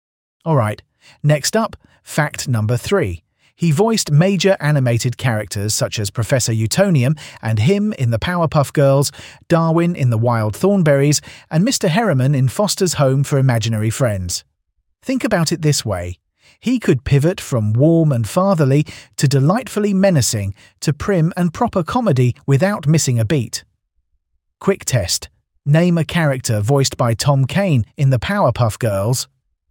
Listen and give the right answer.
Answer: Correct answer, Professor Utonium or him.